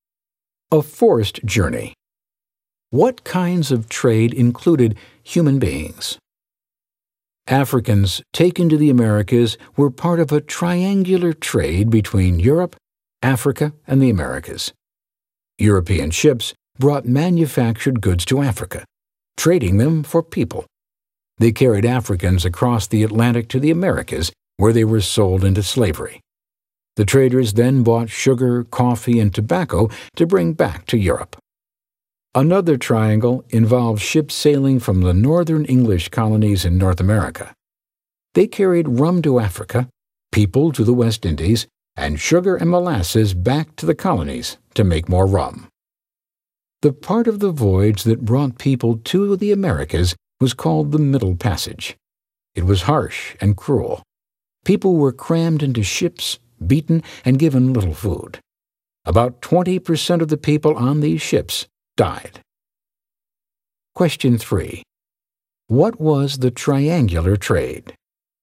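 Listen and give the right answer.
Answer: Trade between Europe, Africa and the Americas: goods to Africa, enslaved Africans to the Americas, sugar, coffee and tobacco to Europe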